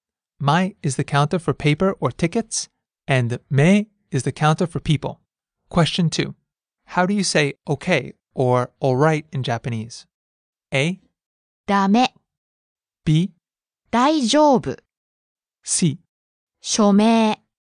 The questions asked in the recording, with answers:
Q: How do you say okay or all right in Japanese?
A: B. 大丈夫